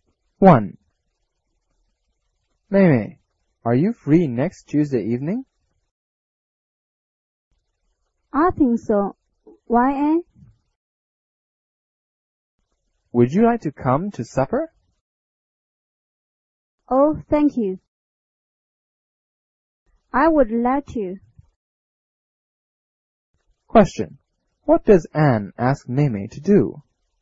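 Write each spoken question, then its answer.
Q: What does Anne ask Mimi to do?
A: To come to supper next Tuesday evening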